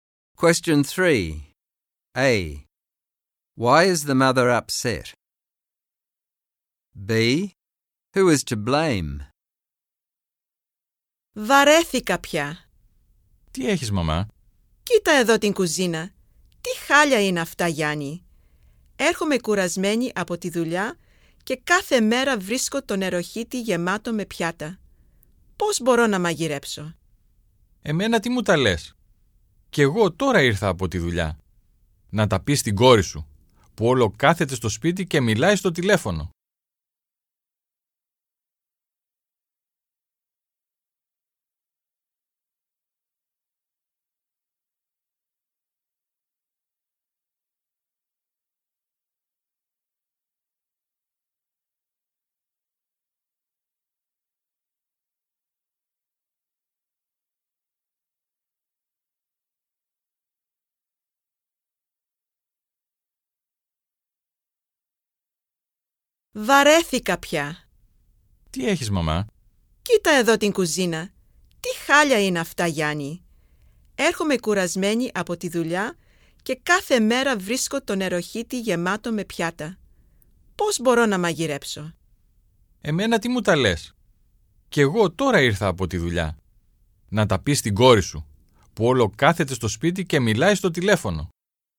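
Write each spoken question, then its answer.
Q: Why is the mother upset?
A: She comes home tired from work every day and finds the kitchen a mess, with the sink full of dishes, so she can't cook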